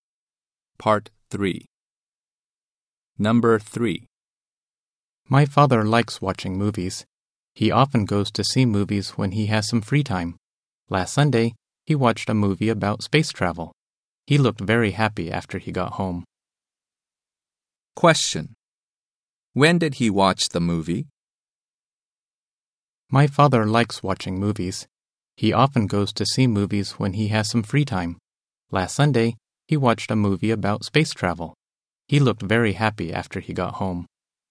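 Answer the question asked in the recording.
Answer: Last Sunday.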